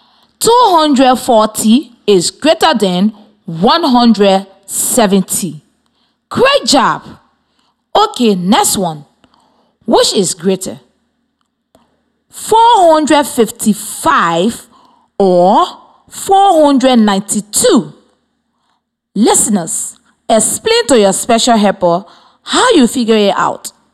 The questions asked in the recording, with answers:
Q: Which is greater?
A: 492 is greater than